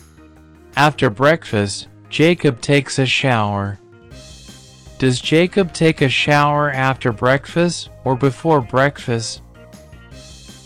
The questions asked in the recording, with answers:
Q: Does Jacob take a shower after breakfast or before breakfast?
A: After breakfast. He takes a shower after breakfast.